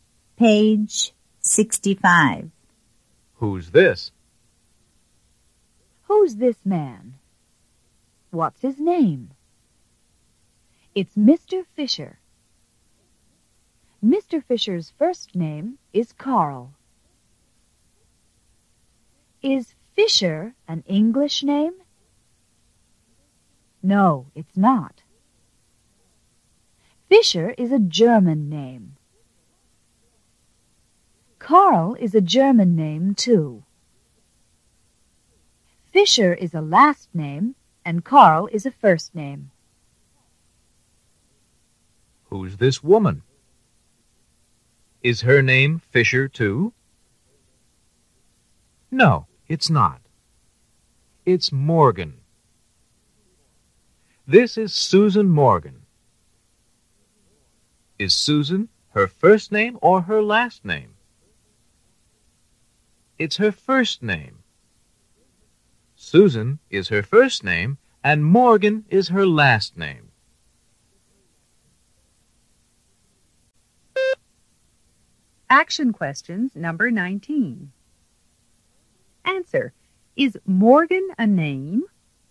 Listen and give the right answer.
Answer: Yes, it is.